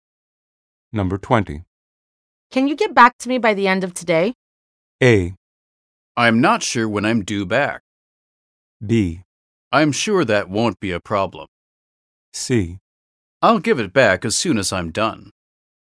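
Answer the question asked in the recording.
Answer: B: I'm sure that won't be a problem.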